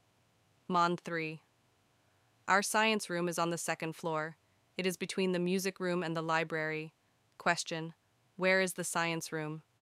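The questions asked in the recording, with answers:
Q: Where is the science room?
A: On the second floor, between the music room and the library.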